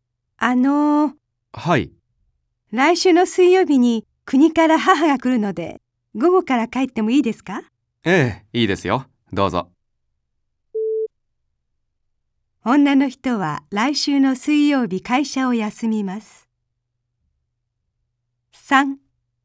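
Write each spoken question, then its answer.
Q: 女の人は来週の水曜日会社を休みます。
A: ×(午後から帰るだけ)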